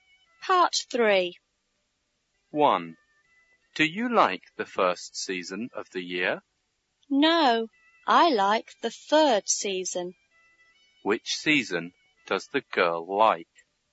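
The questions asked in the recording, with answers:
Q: Which season does the girl like?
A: Autumn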